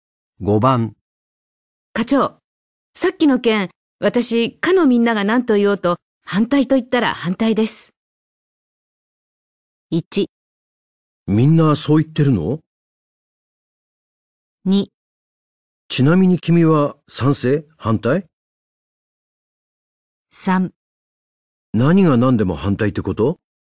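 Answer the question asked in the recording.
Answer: 3: 何が何でも反対ってこと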